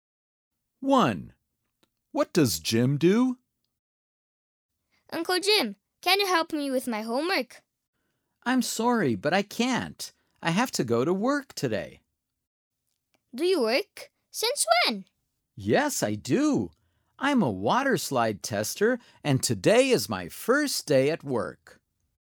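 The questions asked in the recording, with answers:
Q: What does Jim do?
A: He is a water slide tester.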